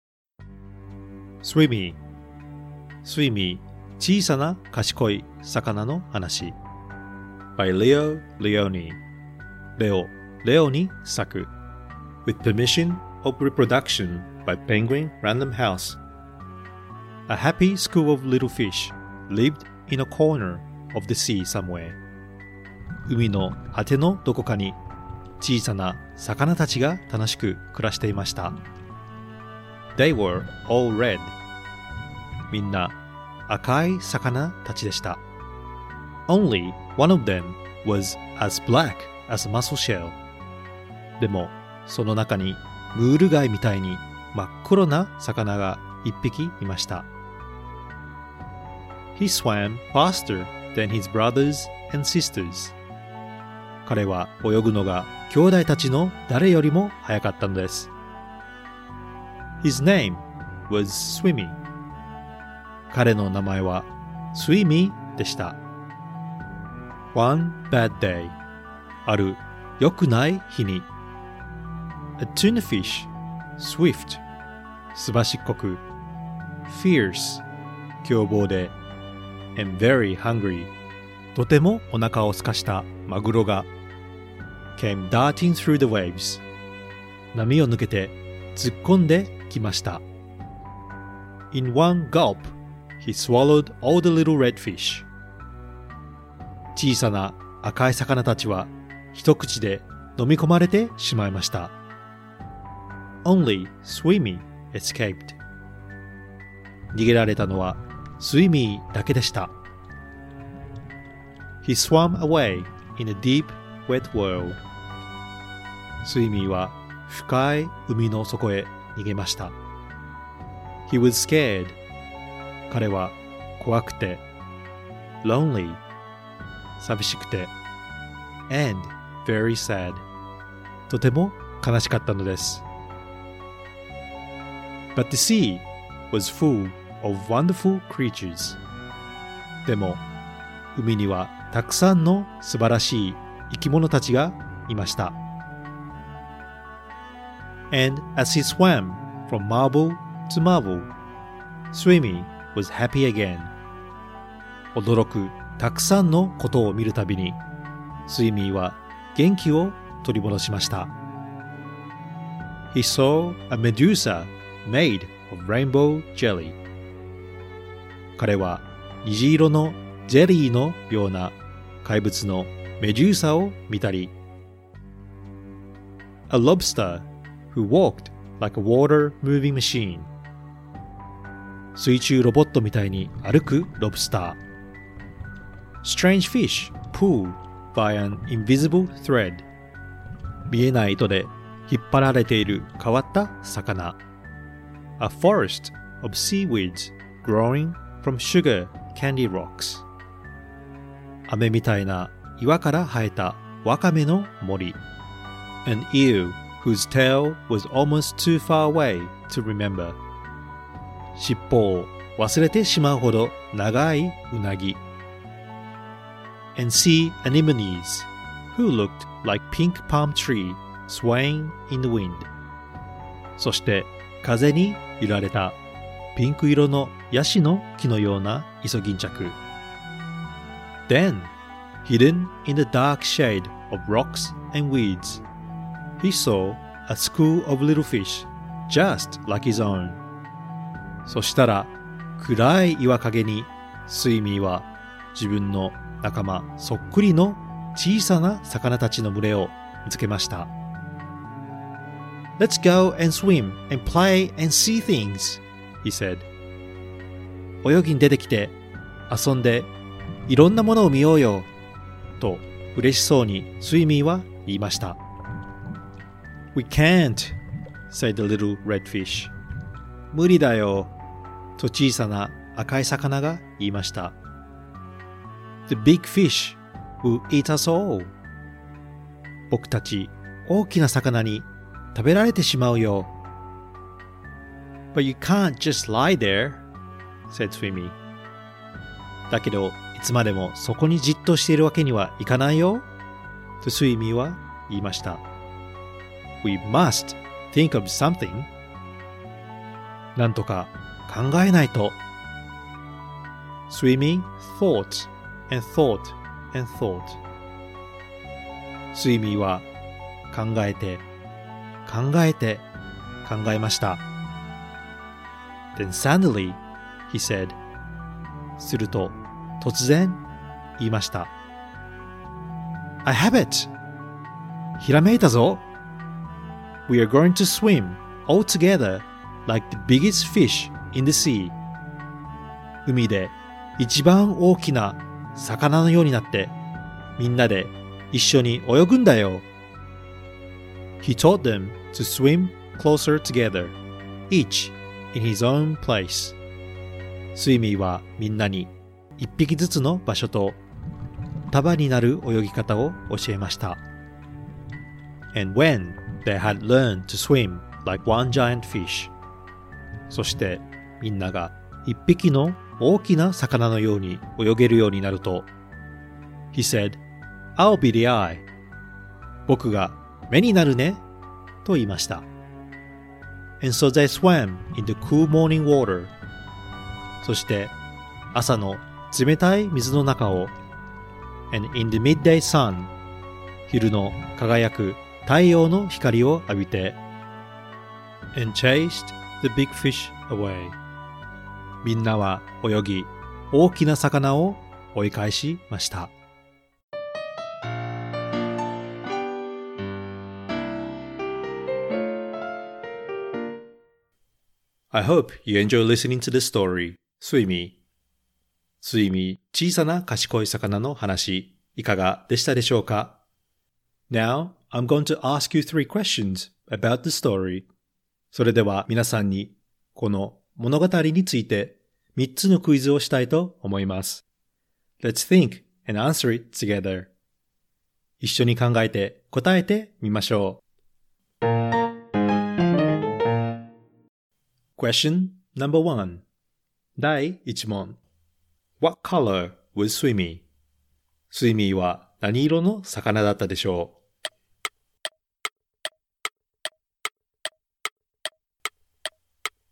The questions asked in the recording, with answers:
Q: What color was Swimmy?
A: The answer is he was a blackfish